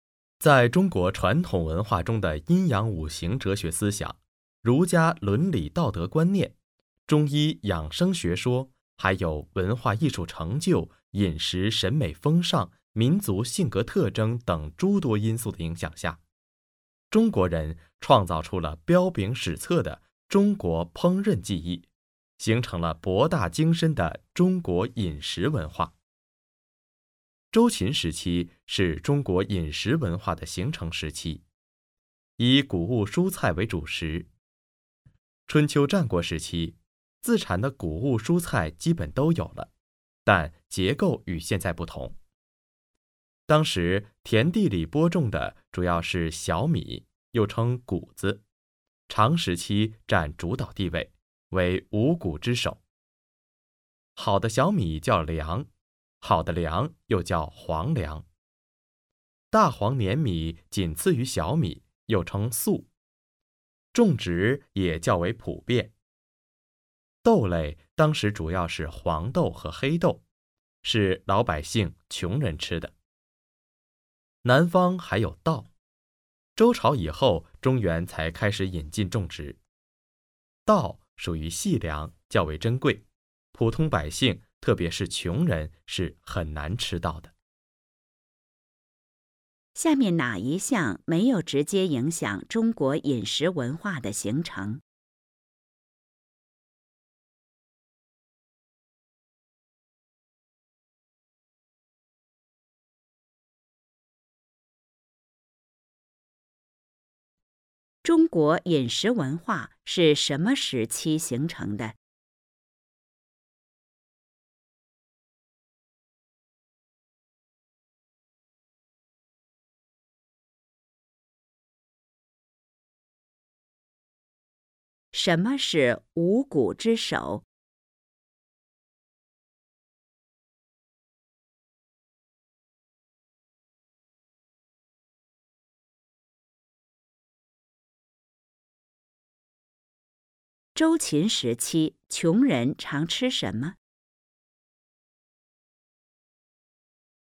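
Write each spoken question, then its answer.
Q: 中国饮食文化是什么时期形成的?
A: 周秦时期

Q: 什么是五谷之首?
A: 小米(谷子)

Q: 周秦时期,穷人常吃什么?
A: 黄豆和黑豆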